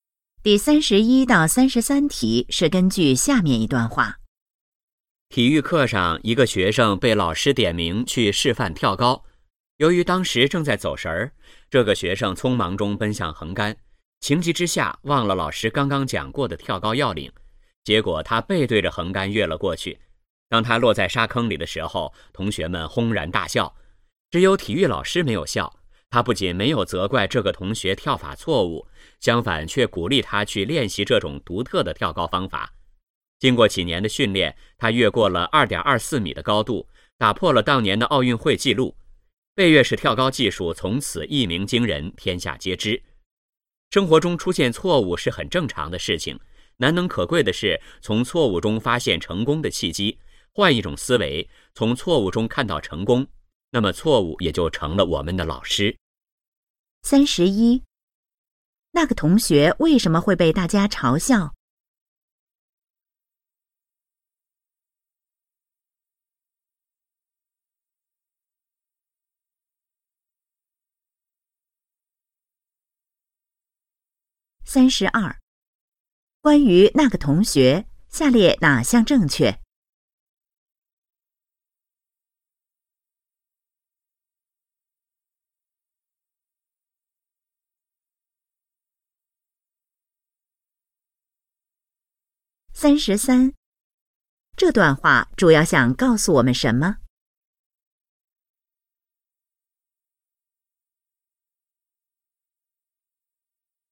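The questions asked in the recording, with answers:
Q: 那个同学为什么会被大家嘲笑?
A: 他背对着横杆跳了过去

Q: 这段话主要想告诉我们什么?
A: 要从错误中发现成功的契机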